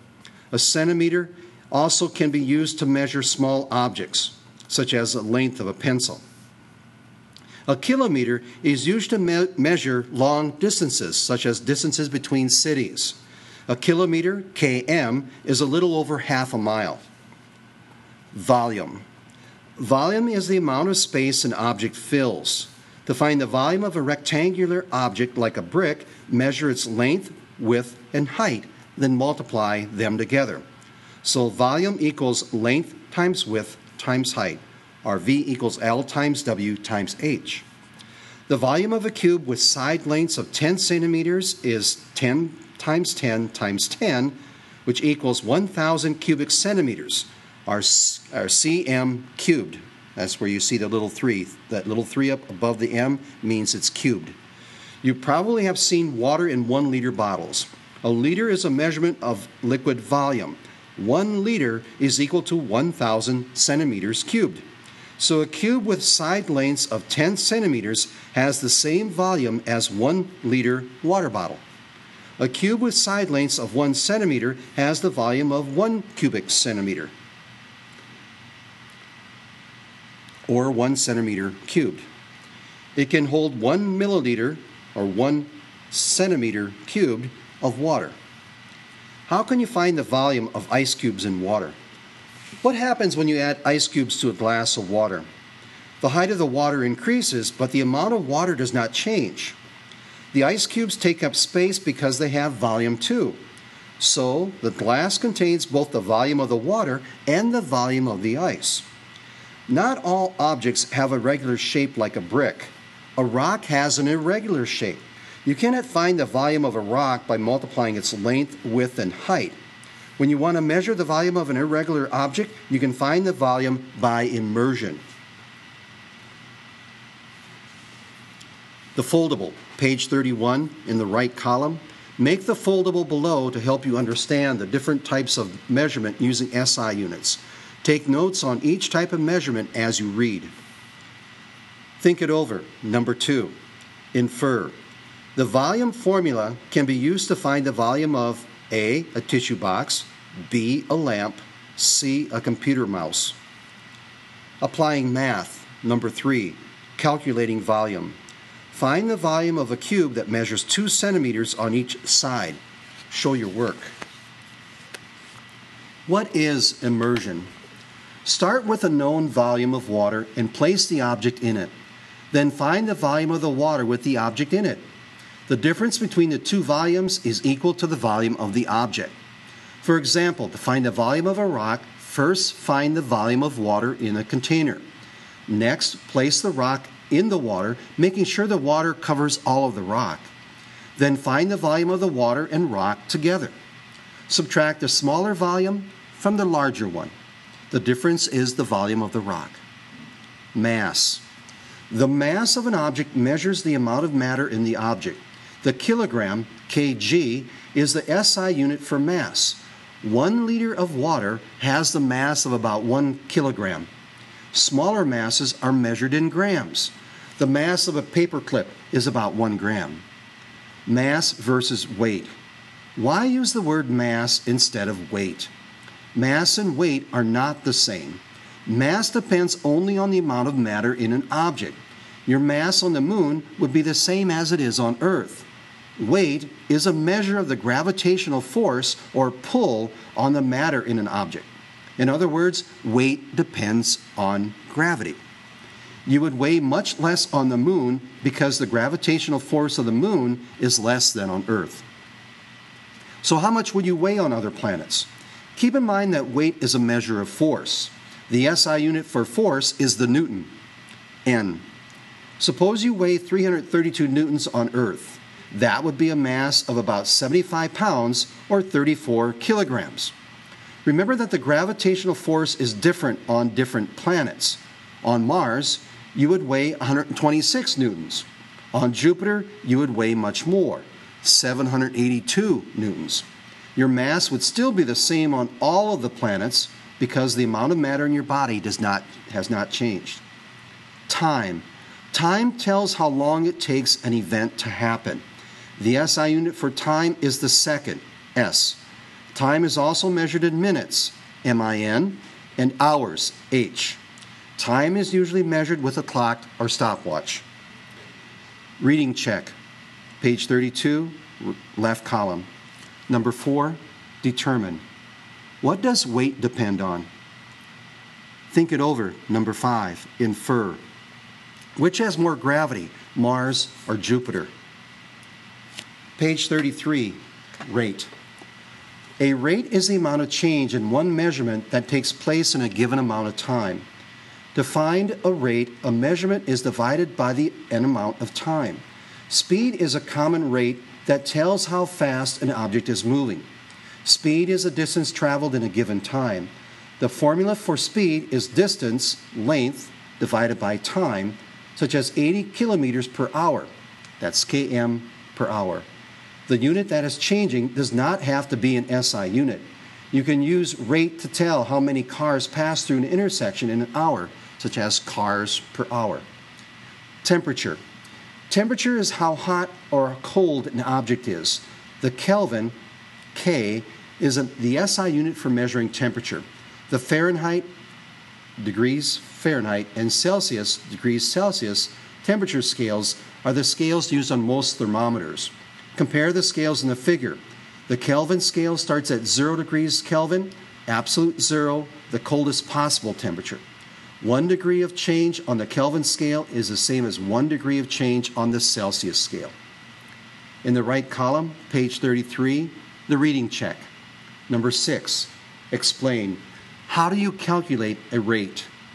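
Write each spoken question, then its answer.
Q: The volume formula can be used to find the volume of A, a tissue box, B, a lamp, C, a computer mouse.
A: A: a tissue box

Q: Find the volume of a cube that measures 2 centimeters on each side.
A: 8 cubic centimeters

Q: What does weight depend on?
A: gravity

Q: Which has more gravity, Mars or Jupiter?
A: Jupiter

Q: How do you calculate a rate?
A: Divide a measurement by an amount of time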